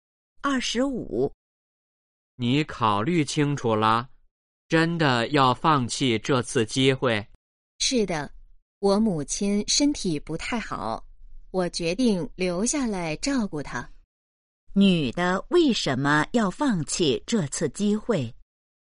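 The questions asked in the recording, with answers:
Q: 女的为什么要放弃这次机会?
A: 要照顾母亲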